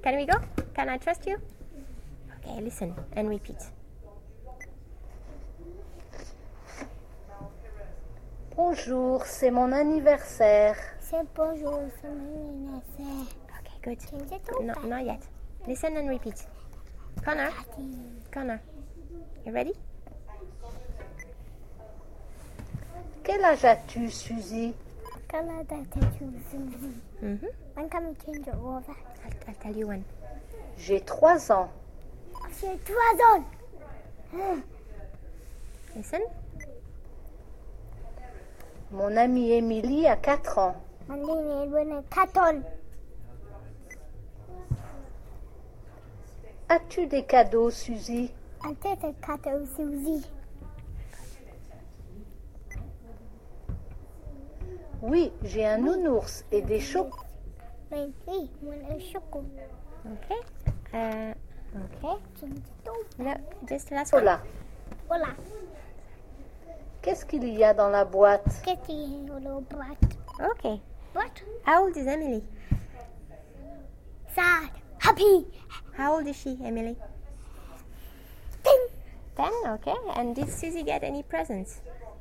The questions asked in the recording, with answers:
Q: And did Susie get any presents?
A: Yes.